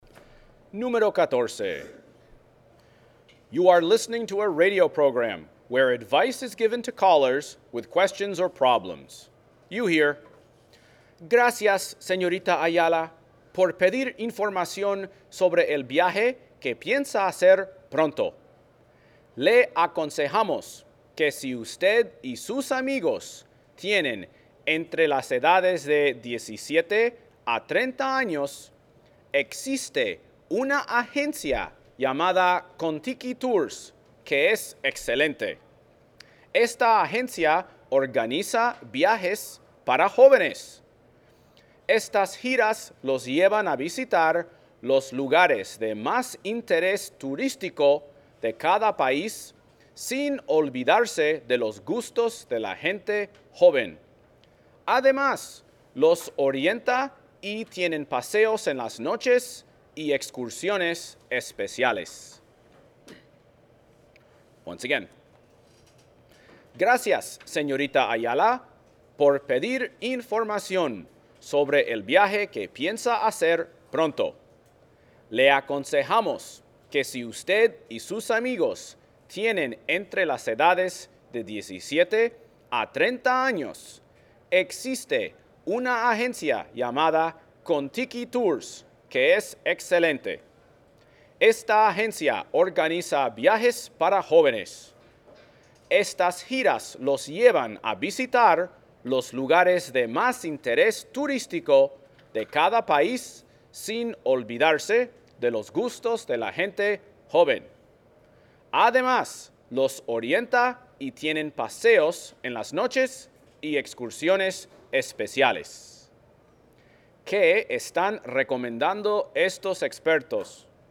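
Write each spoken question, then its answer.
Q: ¿Qué están recomendando estos expertos?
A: Una agencia de viajes para jóvenes (Contiki Tours)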